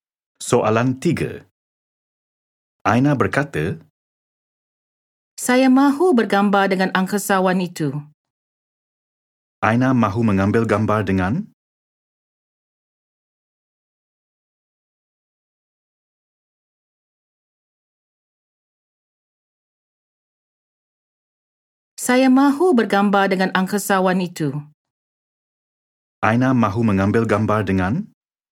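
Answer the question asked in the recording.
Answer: Angkasawan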